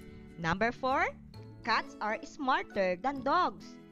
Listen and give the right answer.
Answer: Yes, it is an opinion.